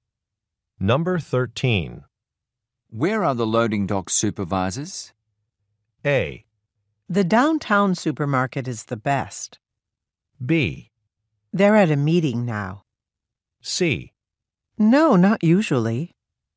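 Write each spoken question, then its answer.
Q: Where are the loading dock supervisors?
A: B: They're at a meeting now.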